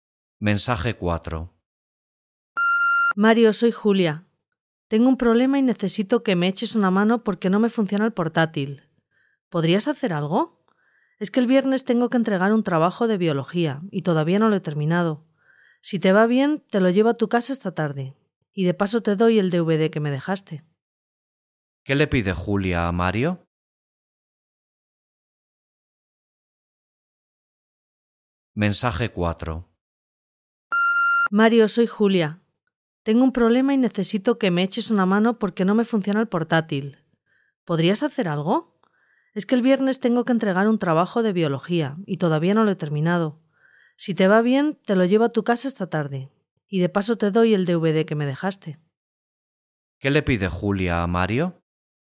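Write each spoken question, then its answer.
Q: ¿Qué le pide Julia a Mario?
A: Que le arregle el portátil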